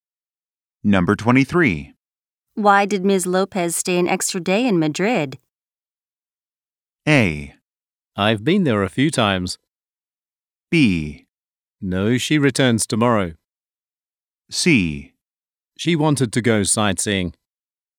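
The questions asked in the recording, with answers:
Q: Why did Ms. Lopez stay an extra day in Madrid?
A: C: She wanted to go sightseeing.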